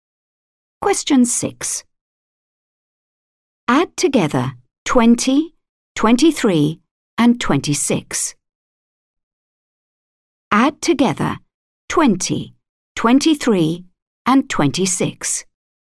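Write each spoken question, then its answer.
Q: Add together 20, 23, and 26.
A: 69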